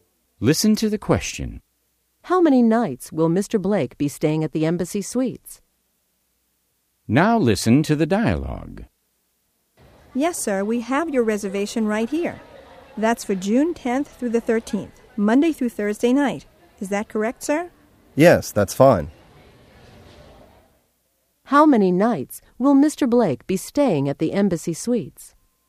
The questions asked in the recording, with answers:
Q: How many nights will Mr. Blake be staying at the Embassy Suites?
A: He will be staying 4 nights, Monday through Thursday.